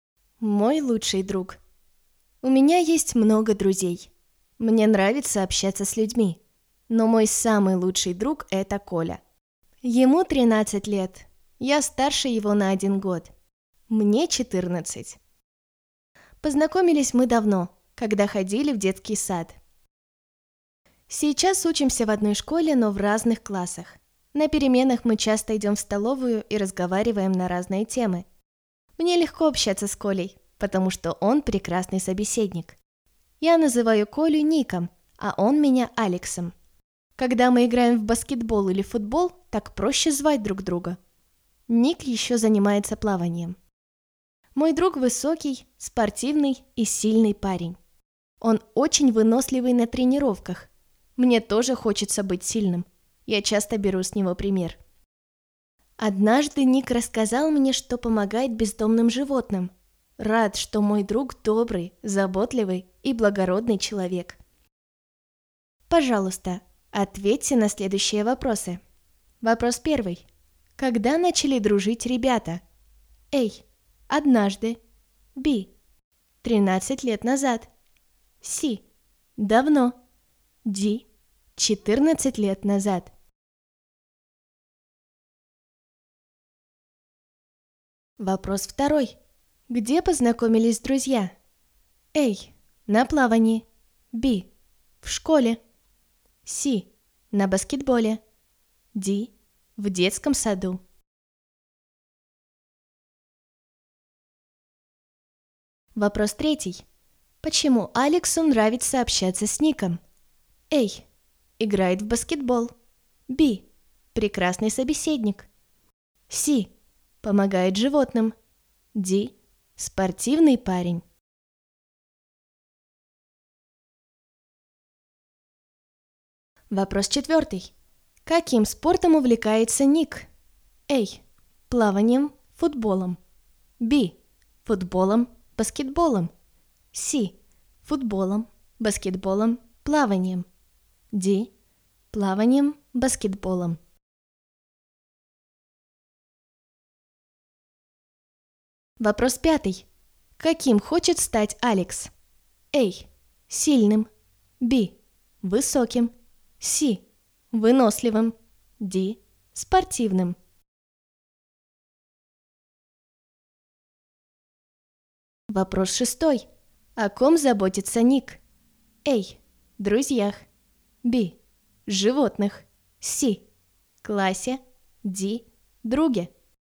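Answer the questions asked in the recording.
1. C: Давно.
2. D: В детском саду.
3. B: Прекрасный собеседник.
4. C: Футболом, баскетболом, плаванием.
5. A: Сильным.
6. B: Животных.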